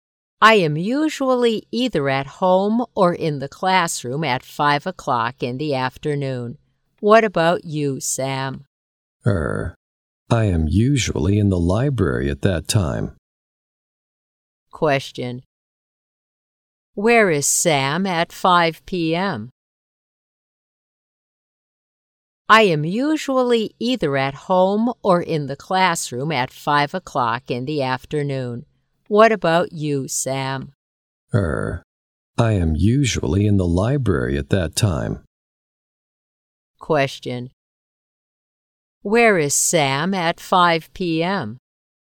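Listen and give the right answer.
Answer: In the library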